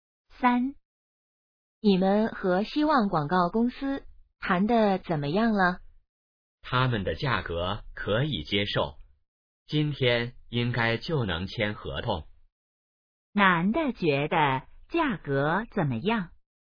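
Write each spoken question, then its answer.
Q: 男的觉得价格怎么样?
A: 可以接受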